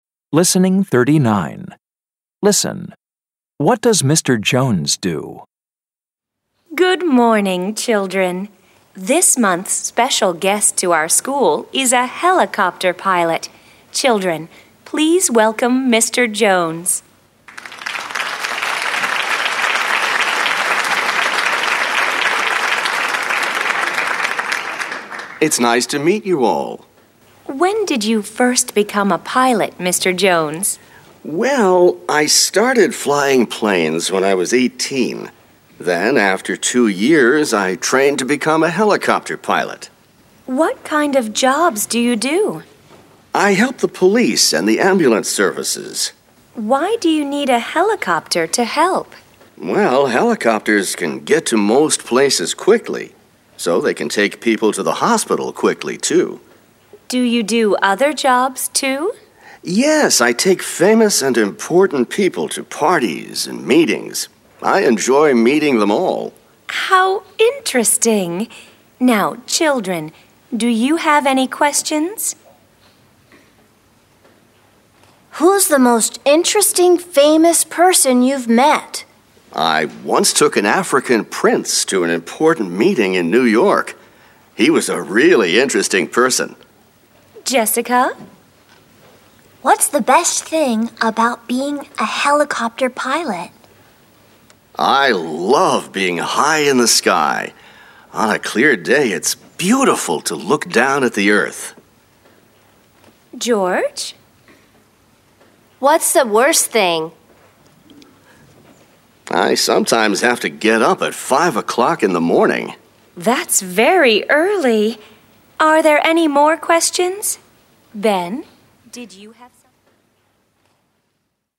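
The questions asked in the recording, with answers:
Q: What does Mr. Jones do?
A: He is a helicopter pilot.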